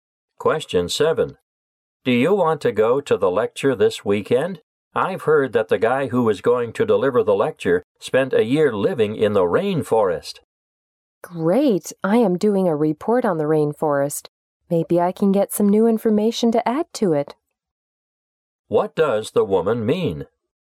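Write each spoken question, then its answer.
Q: What does the woman mean?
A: She wants to go to the lecture to get information for her report.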